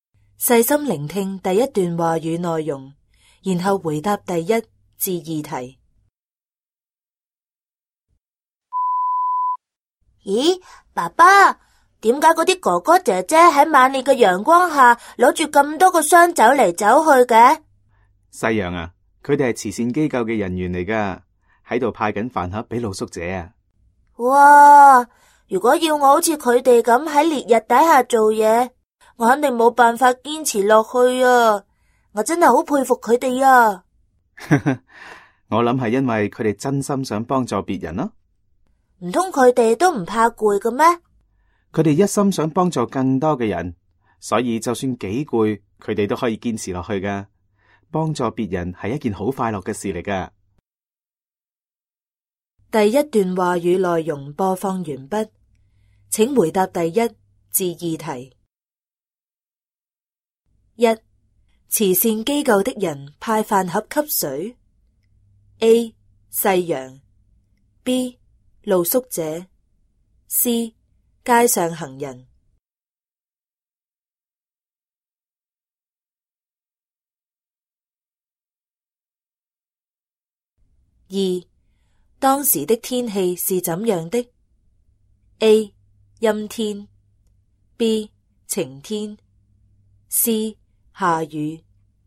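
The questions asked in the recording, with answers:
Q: 慈善机构的人派饭盒给谁 ?A. 细羊 ,B. 露宿者 ,C. 街上行人。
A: B: 露宿者

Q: 当时的天气是怎样的 ?A. 阴天 ,B. 晴天 ,C. 下雨。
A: B: 晴天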